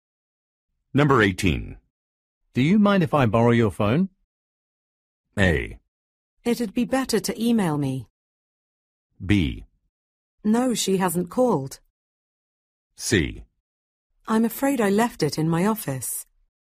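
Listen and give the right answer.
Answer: C: I'm afraid I left it in my office.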